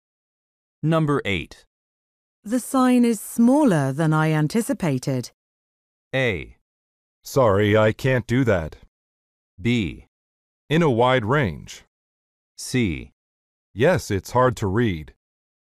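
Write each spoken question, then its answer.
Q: The sign is smaller than I anticipated.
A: C: Yes, it's hard to read.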